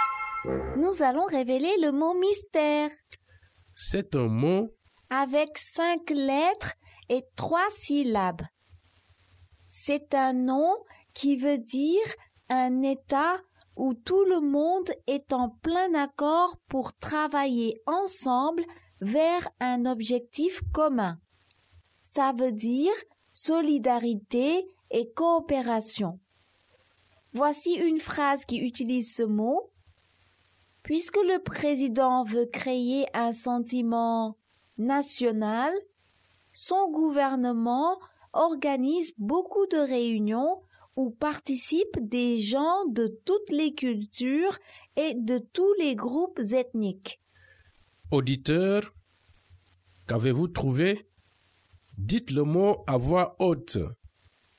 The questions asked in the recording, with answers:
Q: Auditeur, qu'avez-vous trouvé?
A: Le mot mystère est unité.